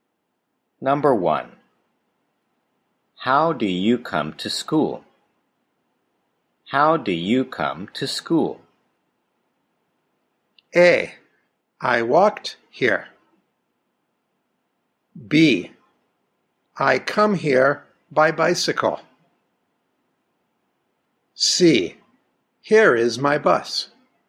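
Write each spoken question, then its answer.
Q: How do you come to school?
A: B: I come here by bicycle.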